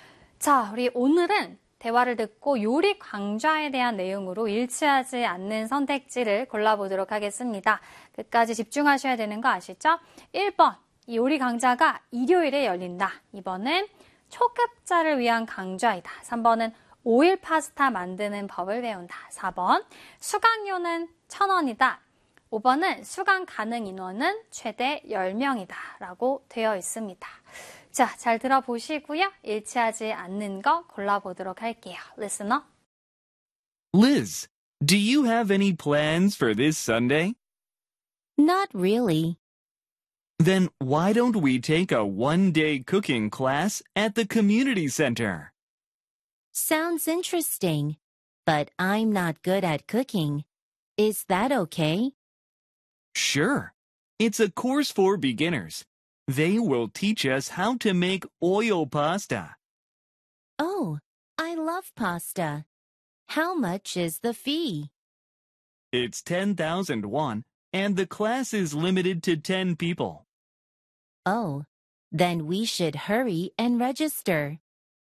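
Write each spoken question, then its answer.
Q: 대화를 듣고 요리 강좌에 대한 내용으로 일치하지 않는 선택지를 골라보도록 하겠습니다.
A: 4번: 수강료는 1,000원이다.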